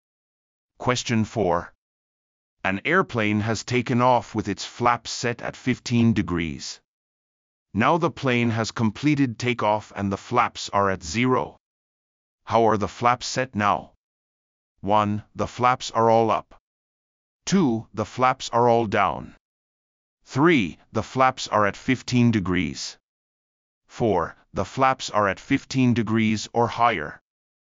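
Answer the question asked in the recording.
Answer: 1: The flaps are all up.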